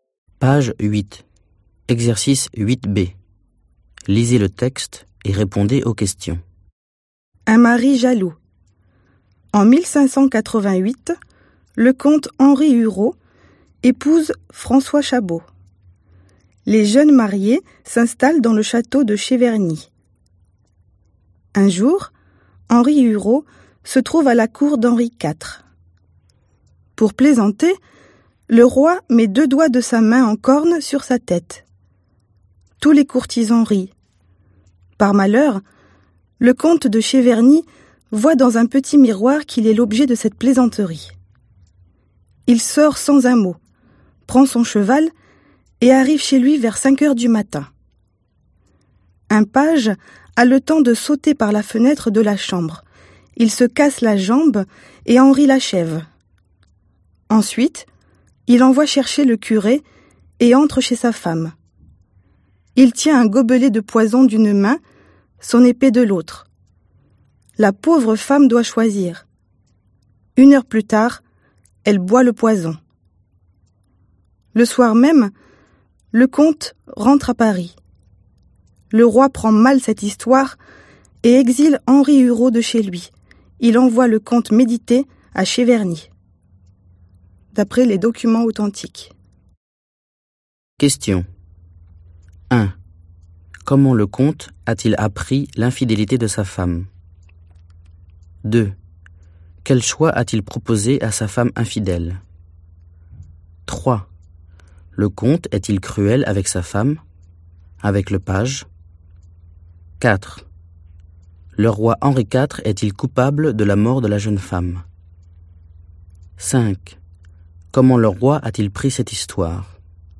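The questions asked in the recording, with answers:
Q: Comment le comte a-t-il appris l'infidélité de sa femme ?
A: Il a vu dans un petit miroir que le roi se moquait de lui (les doigts en corne)

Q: Quel choix a-t-il proposé à sa femme infidèle ?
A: Le poison ou l'épée

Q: Comment le roi a-t-il pris cette histoire ?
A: Mal, il a exilé le comte à Cheverny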